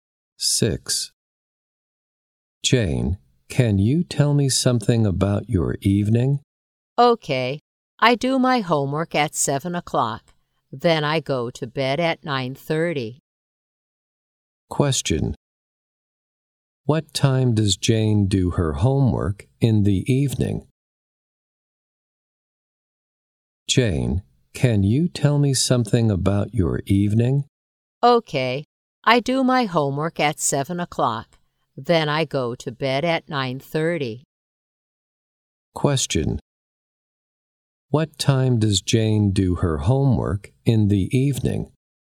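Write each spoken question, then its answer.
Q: What time does Jane do her homework in the evening?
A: At 7 o'clock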